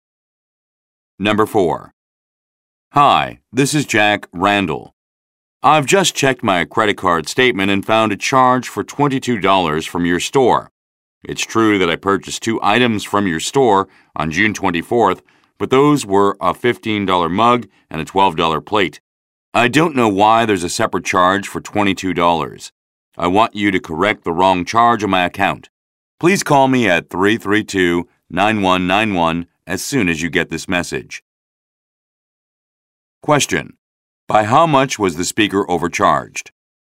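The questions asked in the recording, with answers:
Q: By how much was the speaker overcharged?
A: $22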